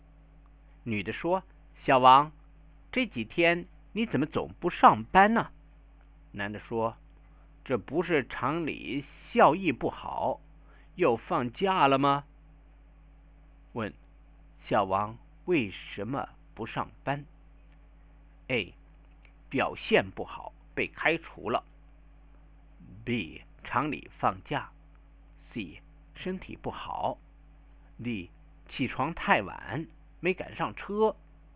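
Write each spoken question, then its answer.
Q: 小王为什么不上班?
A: B: 厂里放假。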